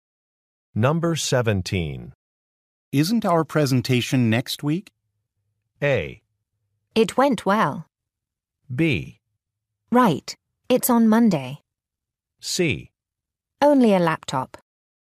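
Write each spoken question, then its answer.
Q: Isn't our presentation next week?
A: B: Right, it's on Monday.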